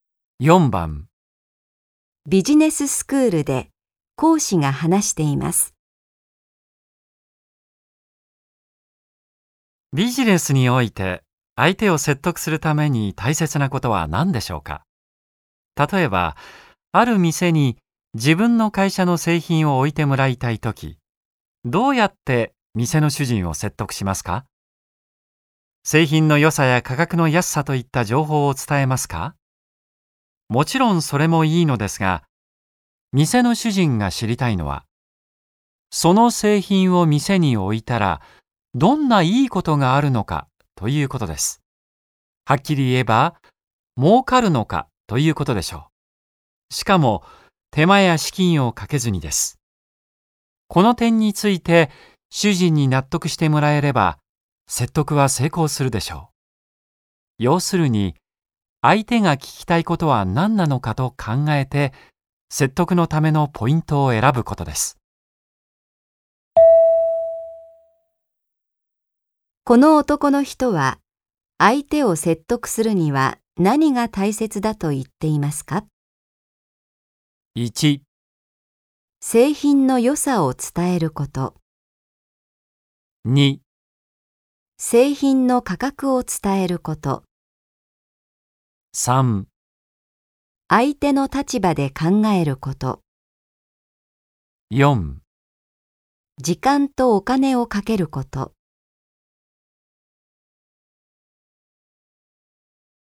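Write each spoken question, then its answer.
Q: この男の人は相手を説得するには何が大切だと言っていますか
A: 3: 相手の立場で考えること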